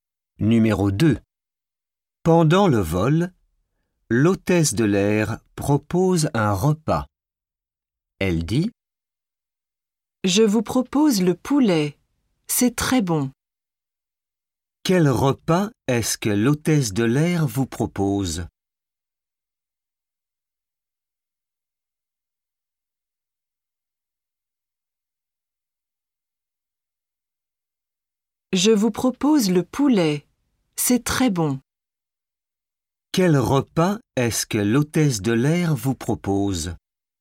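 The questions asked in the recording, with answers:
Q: Quel repas est-ce que l'hôtesse de l'air vous propose ?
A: Le poulet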